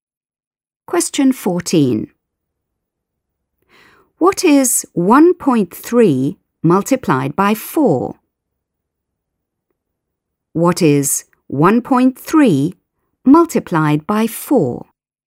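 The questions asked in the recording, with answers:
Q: What is 1.3 multiplied by 4?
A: 5.2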